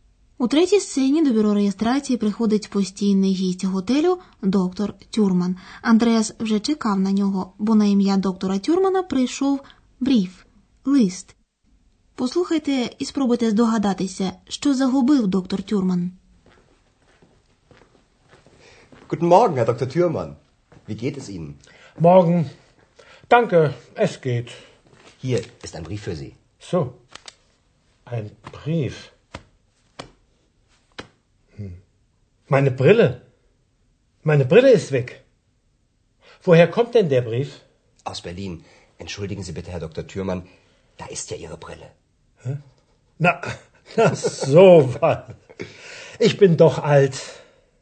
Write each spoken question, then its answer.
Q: Послухайте і спробуйте здогадатися, що загубив доктор Тюрман.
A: Доктор Тюрман каже: «Meine Brille ist weg».